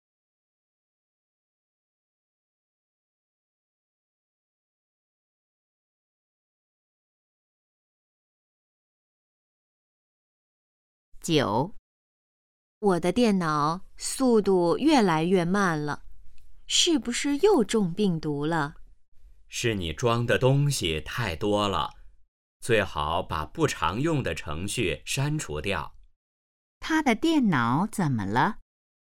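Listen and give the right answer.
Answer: 速度越来越慢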